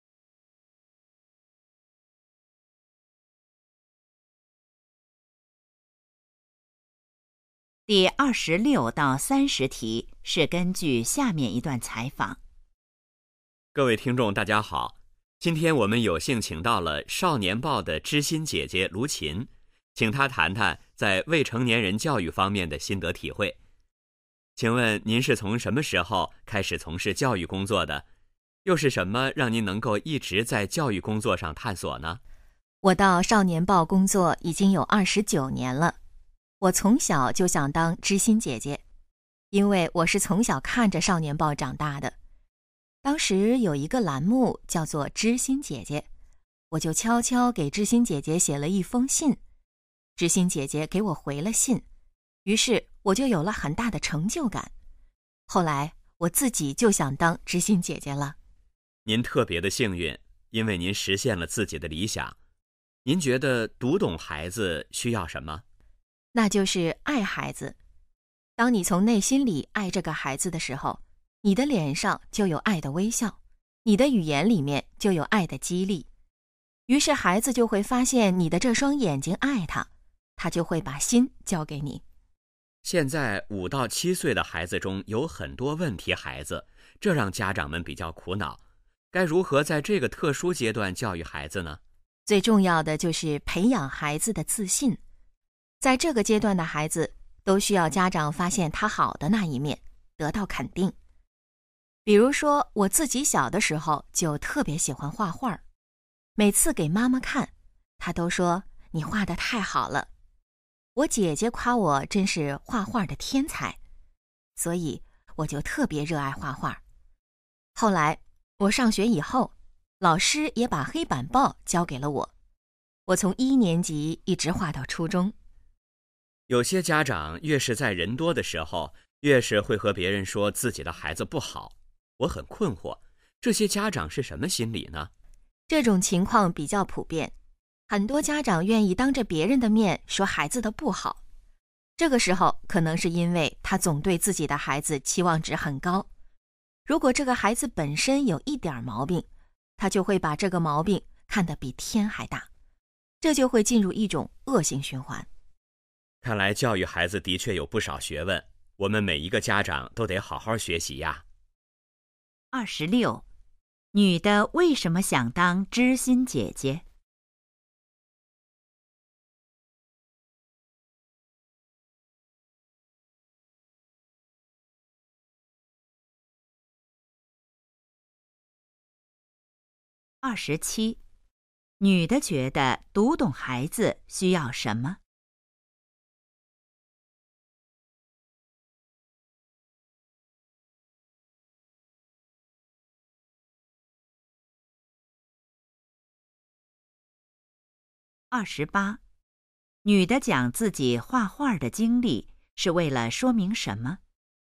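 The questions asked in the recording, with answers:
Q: 女的为什么想当知心姐姐?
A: 小时候给知心姐姐写信得到回信,有很大成就感

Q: 女的觉得读懂孩子需要什么?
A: 爱孩子

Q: 女的讲自己画画的经历是为了说明什么?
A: 要培养孩子的自信,肯定孩子

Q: 为什么有些家长当着别人的面批评孩子?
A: 对孩子期望值太高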